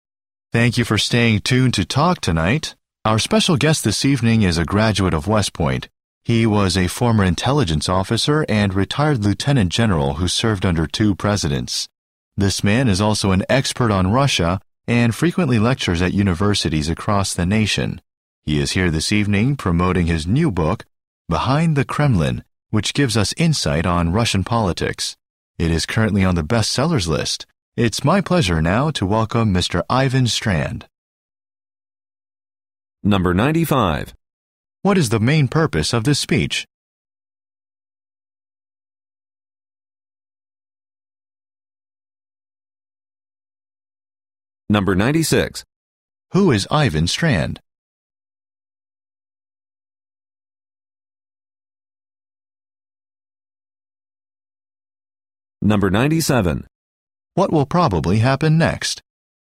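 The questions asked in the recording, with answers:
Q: What is the main purpose of this speech?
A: To introduce a guest on the show

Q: Who is Ivan Strand?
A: A retired lieutenant general and Russia expert who wrote Behind the Kremlin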